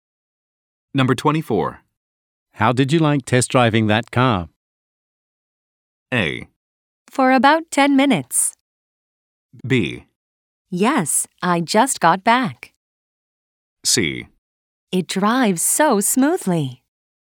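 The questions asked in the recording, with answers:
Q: How did you like test driving that car?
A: C: It drives so smoothly.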